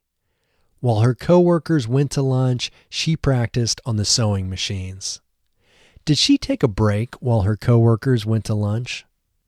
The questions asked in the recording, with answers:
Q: Did she take a break while her coworkers went to lunch?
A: No, she didn't take a break when her coworkers went to lunch.